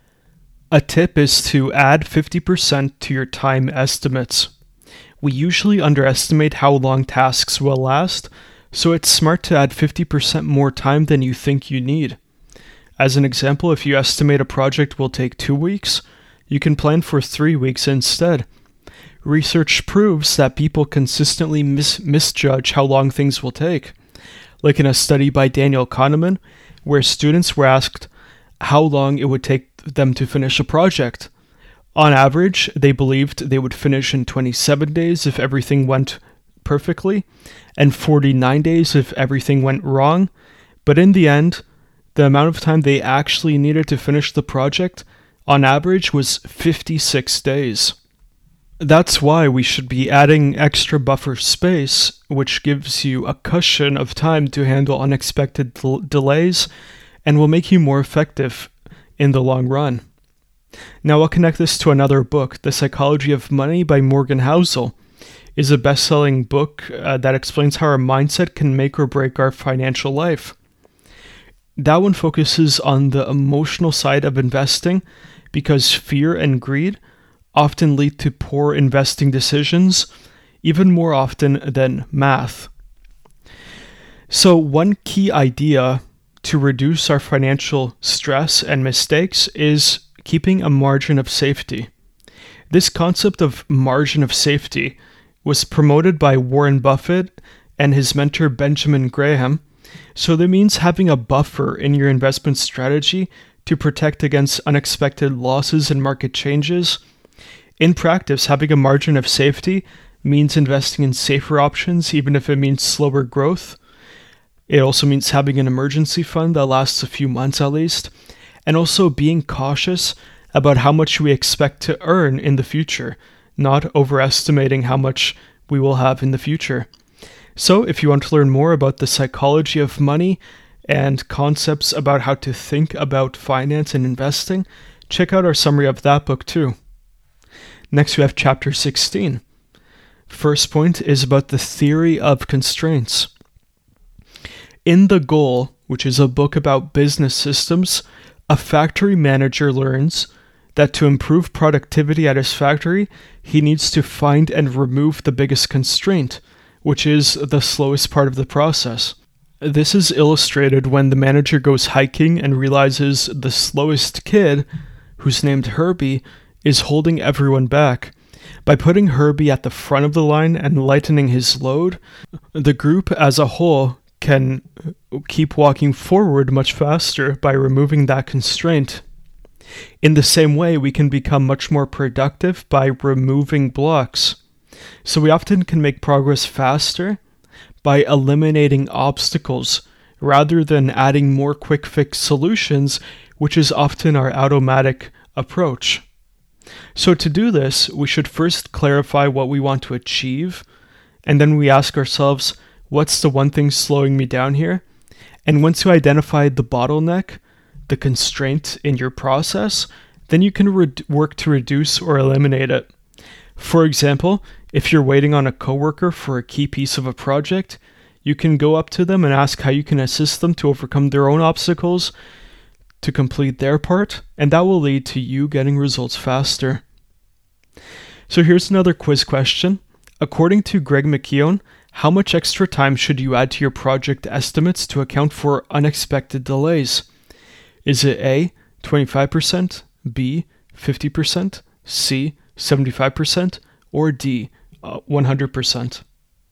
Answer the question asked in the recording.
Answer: The correct answer here is B, 50%.